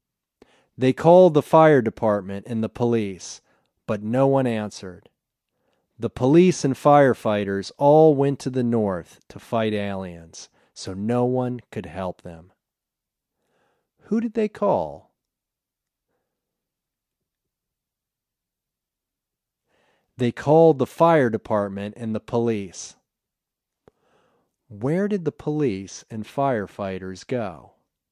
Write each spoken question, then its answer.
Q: Who did they call?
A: They called the fire department and the police.

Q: Where did the police and firefighters go?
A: They all went north to fight the aliens.